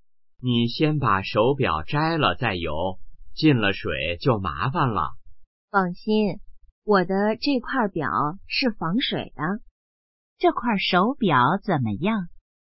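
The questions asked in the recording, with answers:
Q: 这块手表怎么样?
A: 防水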